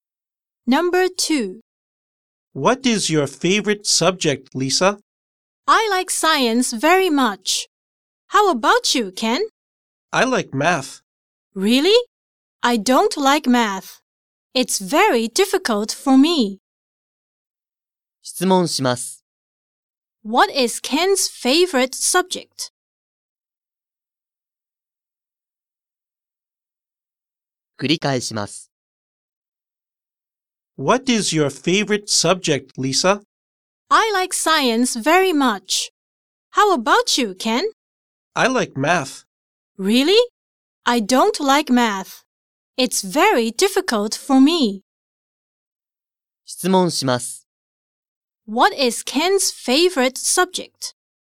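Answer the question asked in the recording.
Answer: Math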